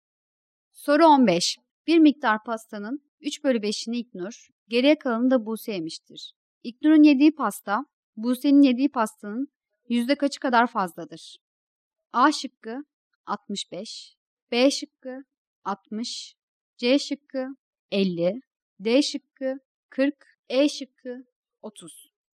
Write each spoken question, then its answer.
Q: İknur'un yediği pasta, Buse'nin yediği pastanın yüzde kaçı kadar fazladır?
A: Doğru cevap C şıkkı.